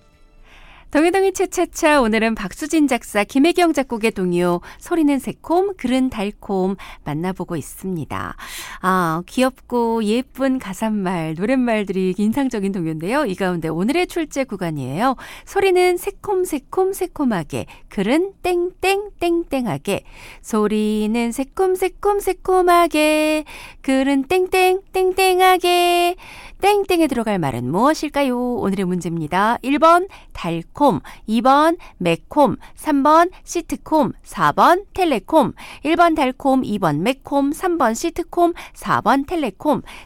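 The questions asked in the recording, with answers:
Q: 땡땡에 들어갈 말은 무엇일까요?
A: 1: 달콤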